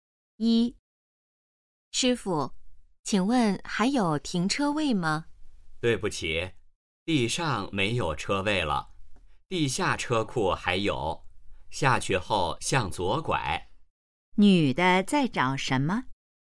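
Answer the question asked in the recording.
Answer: 停车位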